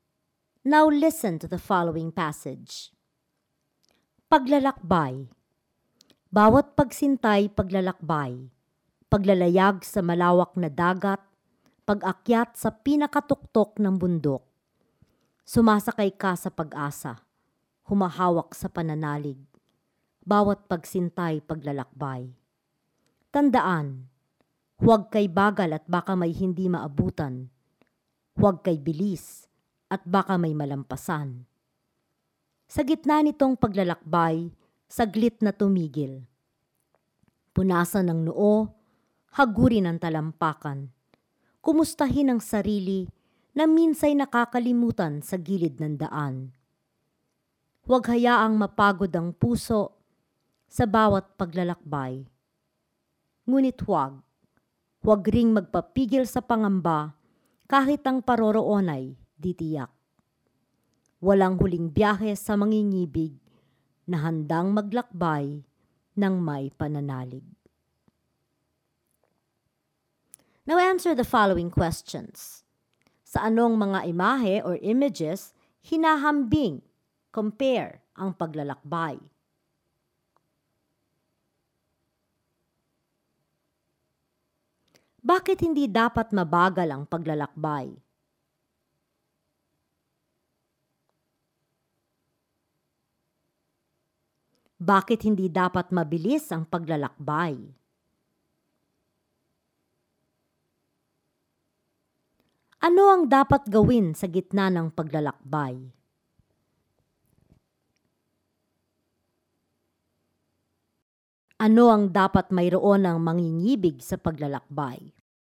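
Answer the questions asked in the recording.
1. Paglalayag sa malawak na dagat at pag-akyat sa pinakatuktok ng bundok
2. Baka may hindi maabutan
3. Baka may malampasan
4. Saglit na tumigil, punasan ang noo, hagurin ang talampakan, kumustahin ang sarili
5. Pananalig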